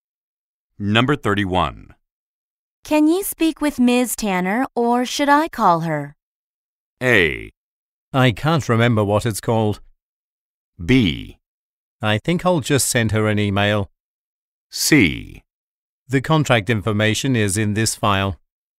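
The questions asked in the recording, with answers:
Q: Can you speak with Ms. Tanner or should I call her?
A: B: I think I'll just send her an email.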